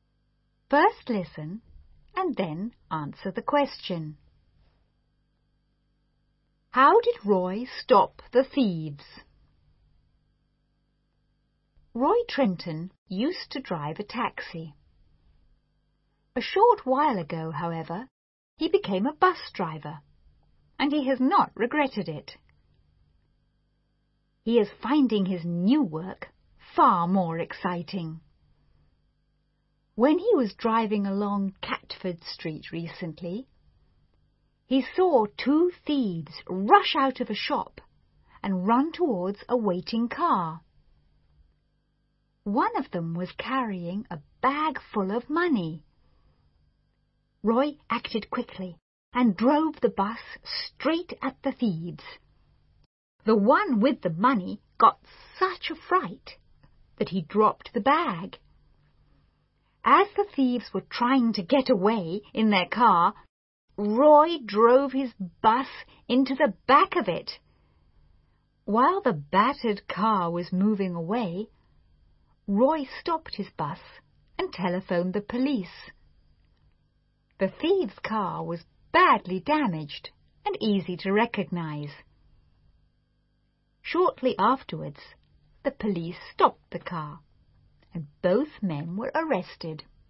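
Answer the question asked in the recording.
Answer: He drove his bus straight at them and then into the back of their car.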